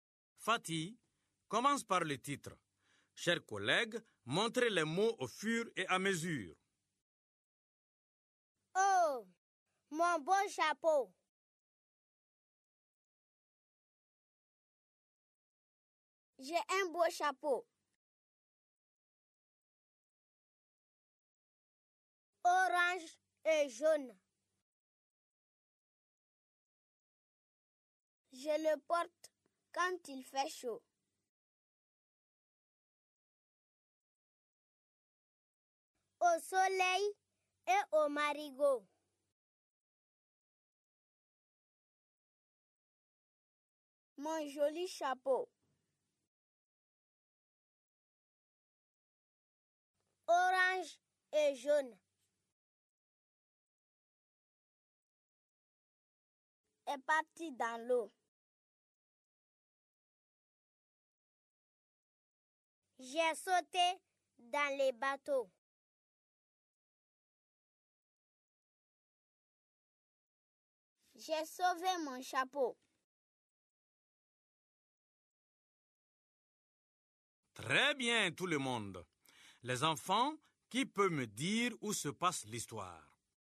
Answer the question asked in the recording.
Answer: Monsieur, c'est dans l'eau au marigot.